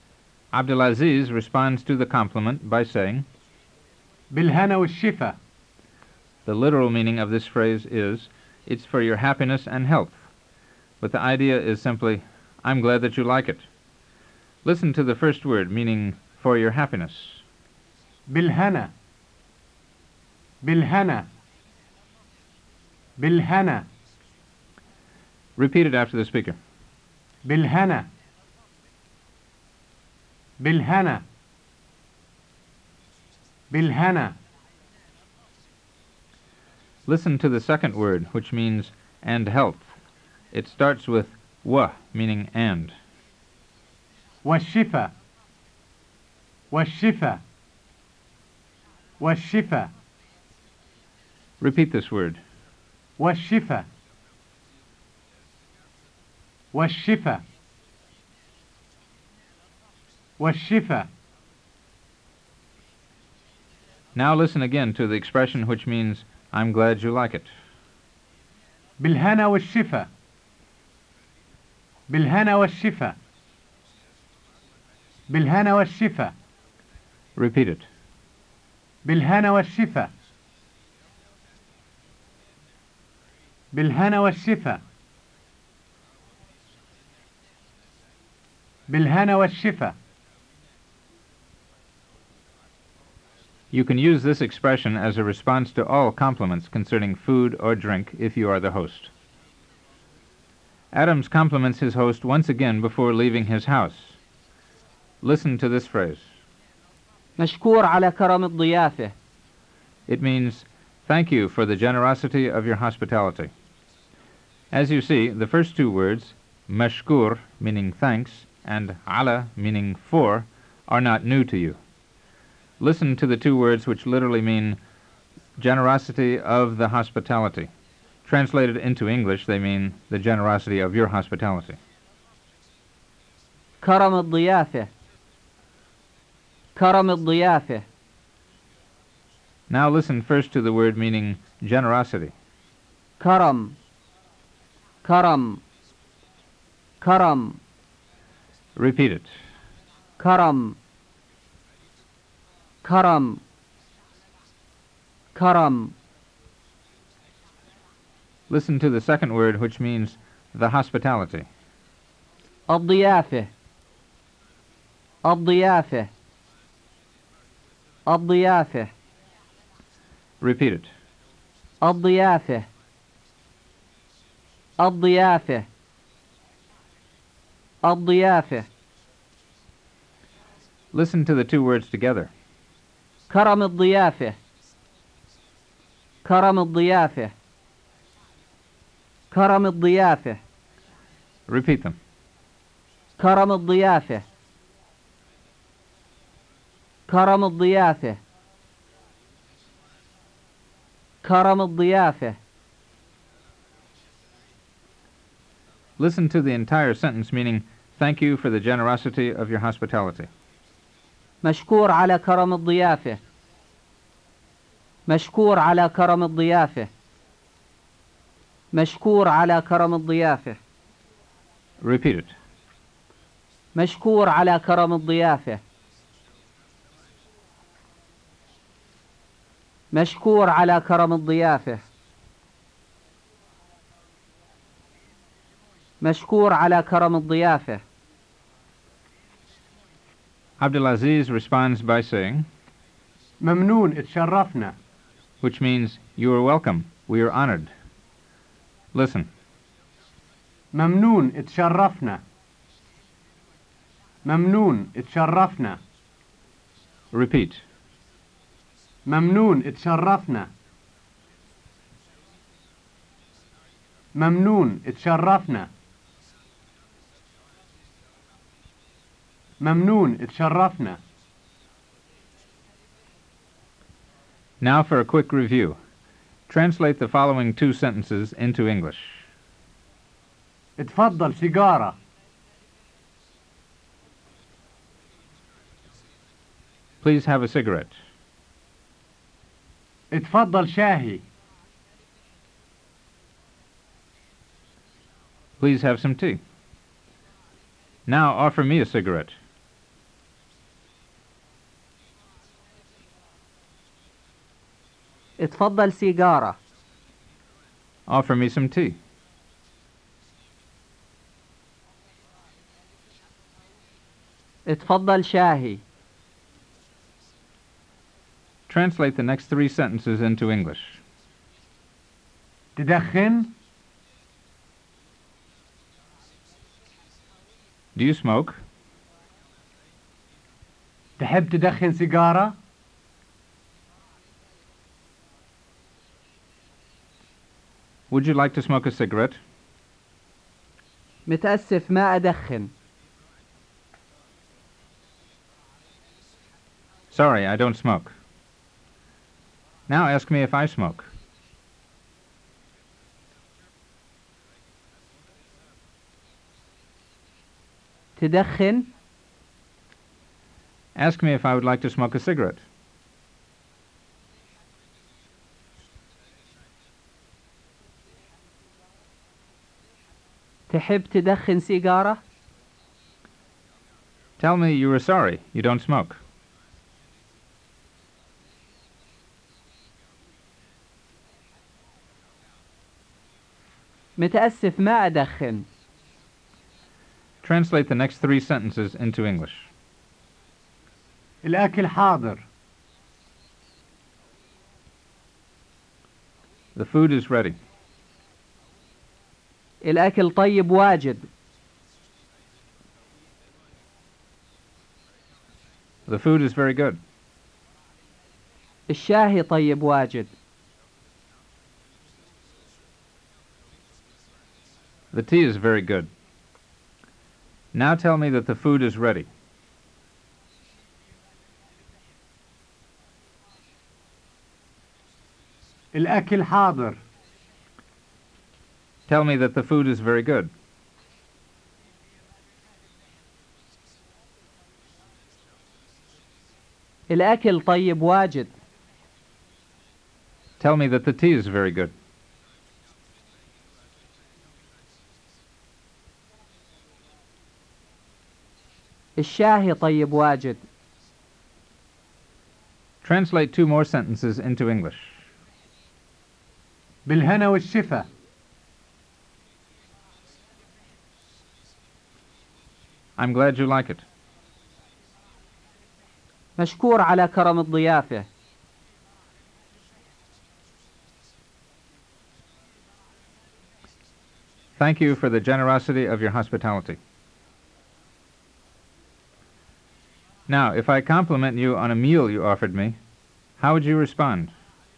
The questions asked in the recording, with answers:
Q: Now, if I compliment you on a meal you offered me, how would you respond?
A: بالهنا والشفا.